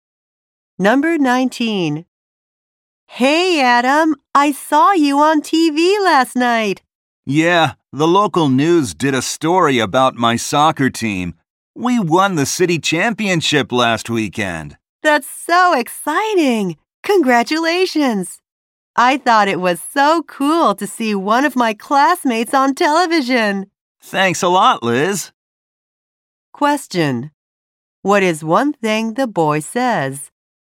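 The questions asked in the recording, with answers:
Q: What is one thing the boy says?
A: His soccer team won the city championship.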